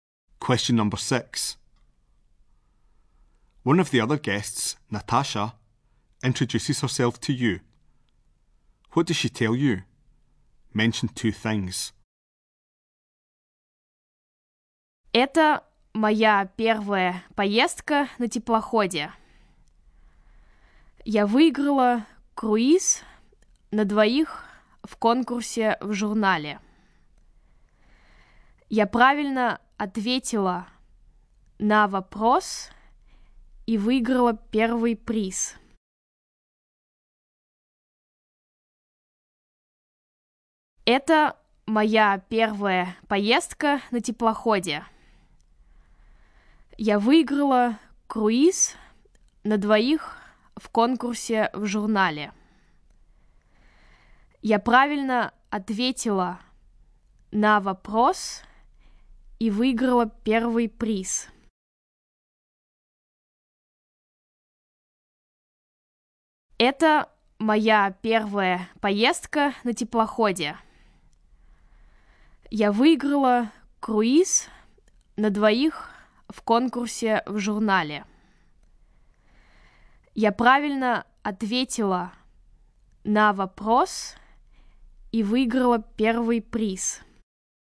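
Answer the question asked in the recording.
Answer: It's her first ship trip; she won a cruise for two in a magazine competition (first prize)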